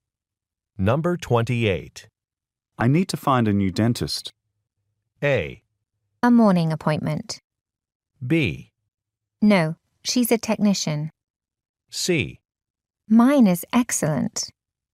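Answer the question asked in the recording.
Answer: C: Mine is excellent.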